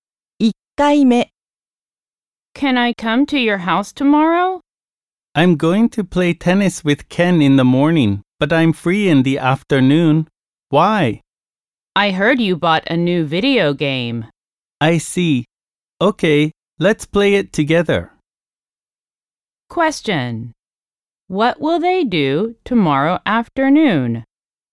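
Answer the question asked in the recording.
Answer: Play a new video game together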